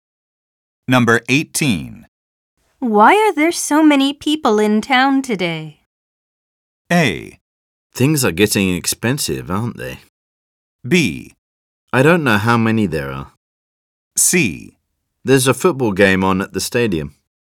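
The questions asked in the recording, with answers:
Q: Why are there so many people in town today?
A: C: There's a football game on at the stadium.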